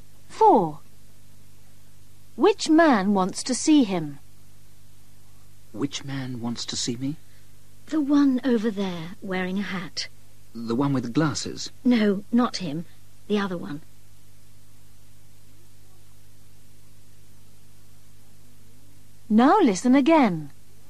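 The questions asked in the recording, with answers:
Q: Which man wants to see him?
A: The man wearing a hat, not the one with glasses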